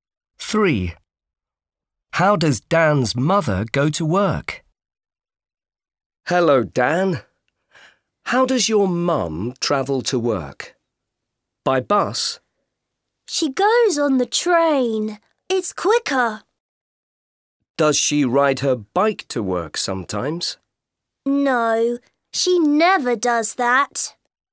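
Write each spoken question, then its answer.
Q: How does Dan's mother go to work?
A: by train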